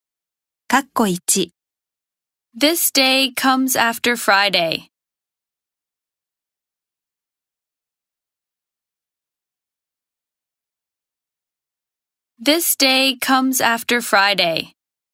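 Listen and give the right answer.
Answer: Saturday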